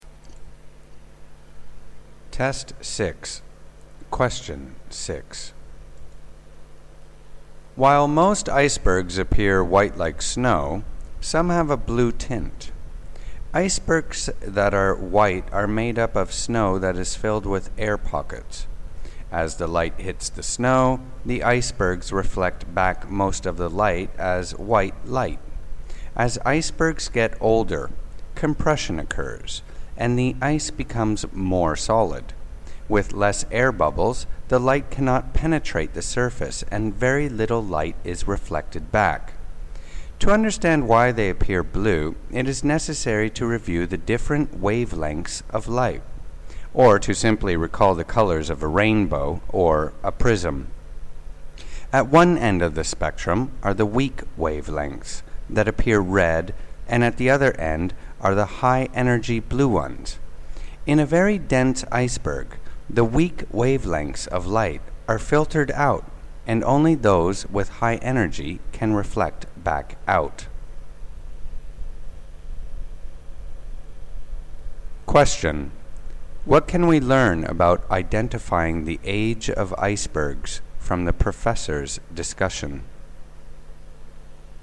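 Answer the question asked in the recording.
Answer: Older icebergs tend to look blue because they are denser, while younger ones look white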